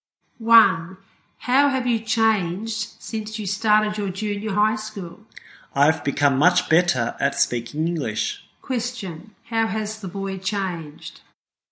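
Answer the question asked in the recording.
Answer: He has become much better at speaking English.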